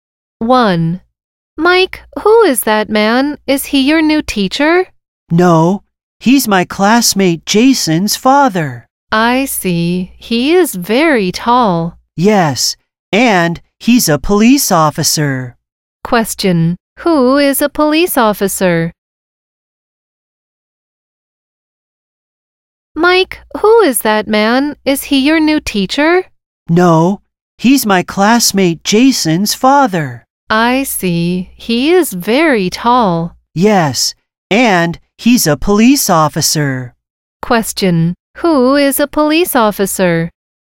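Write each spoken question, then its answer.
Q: Who is a police officer?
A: Jason's father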